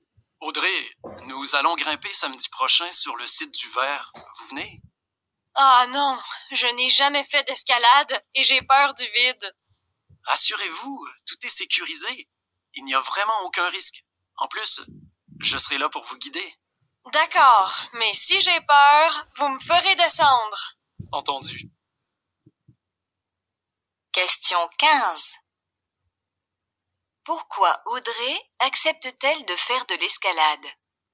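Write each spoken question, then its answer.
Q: Pourquoi Audrey accepte-t-elle de faire de l'escalade?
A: Parce que tout est sécurisé, sans risque, et qu'on la guidera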